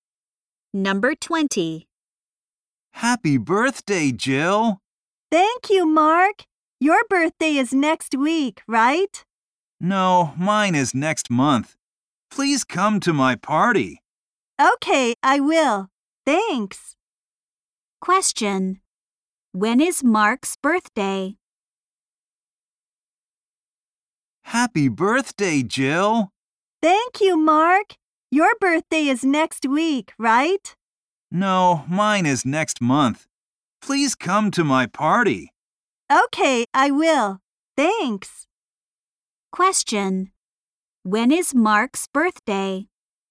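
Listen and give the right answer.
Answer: Next month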